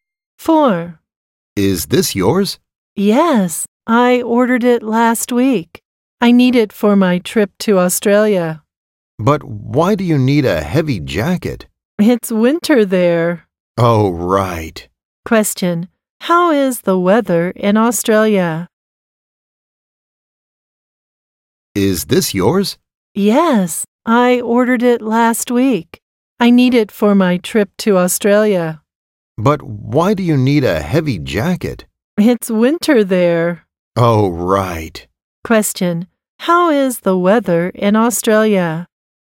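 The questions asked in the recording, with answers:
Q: how is the weather in Australia?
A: It's winter there (cold).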